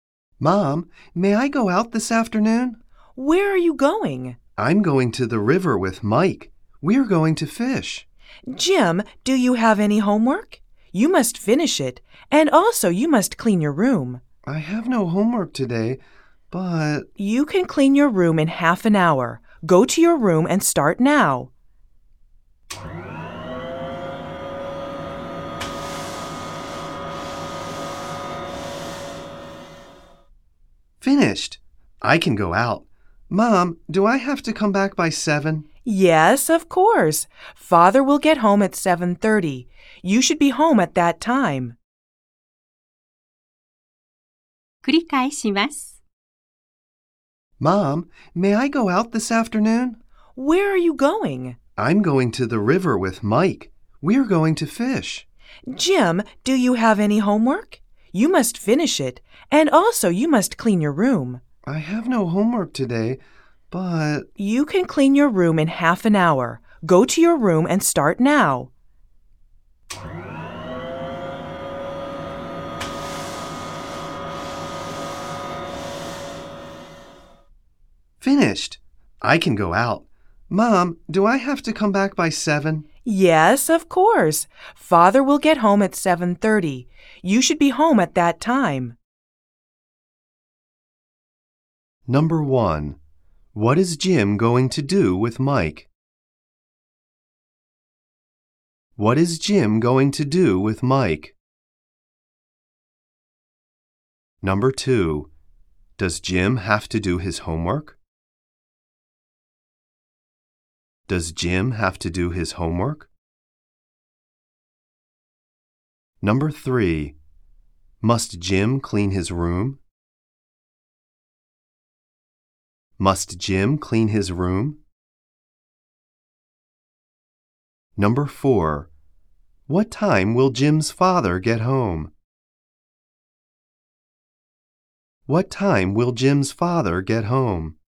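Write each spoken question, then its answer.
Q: What is Jim going to do with Mike?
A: Go fishing at the river.

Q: Does Jim have to do his homework?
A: No, he doesn't (he has no homework today).

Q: Must Jim clean his room?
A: Yes, he must.

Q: What time will Jim's father get home?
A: At 7:30.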